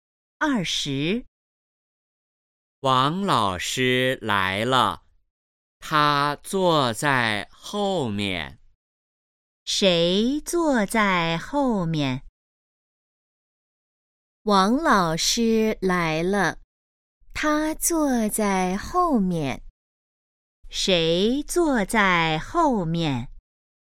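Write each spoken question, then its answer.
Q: 谁坐在后面?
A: 王老师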